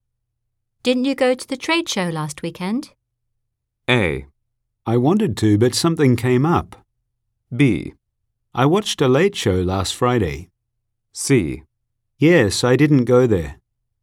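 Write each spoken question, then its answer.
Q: Didn't you go to the trade show last weekend?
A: A: I wanted to, but something came up.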